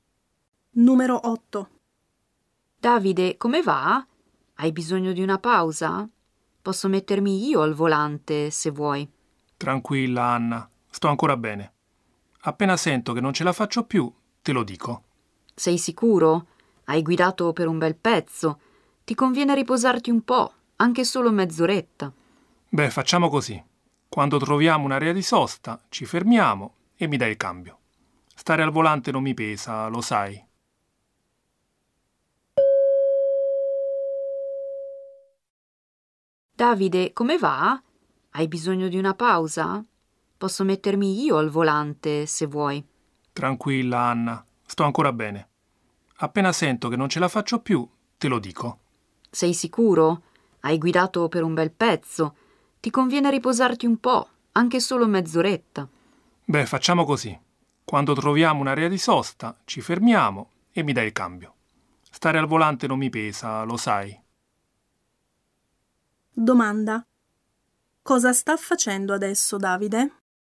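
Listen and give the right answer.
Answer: Sta guidando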